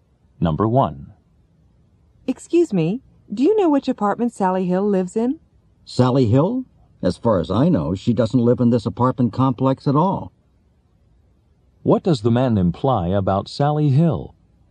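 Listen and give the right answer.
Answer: She doesn't live in this apartment complex.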